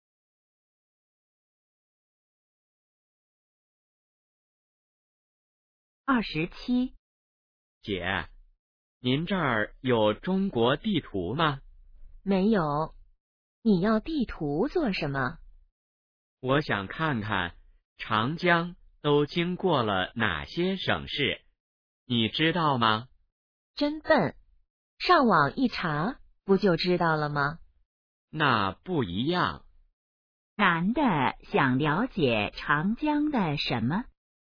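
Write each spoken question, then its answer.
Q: 男的想了解长江的什么?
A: 经过哪些省市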